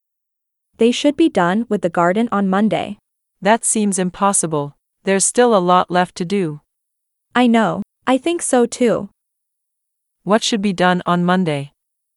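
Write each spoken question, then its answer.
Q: What should be done on Monday?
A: The garden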